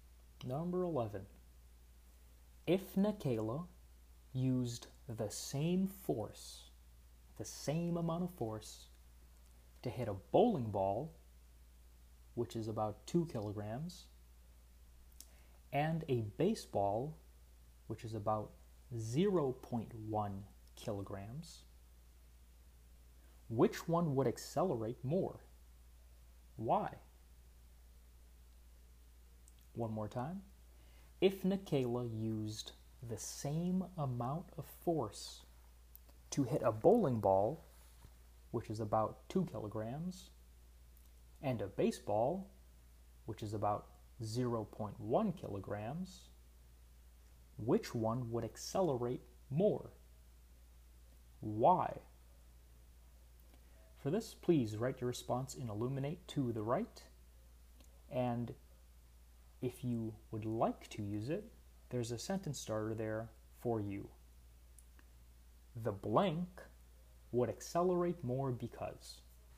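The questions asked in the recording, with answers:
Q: If Nikayla used the same force, the same amount of force, to hit a bowling ball, which is about 2 kilograms, and a baseball, which is about 0.1 kilograms, which one would accelerate more?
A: The baseball, because it has less mass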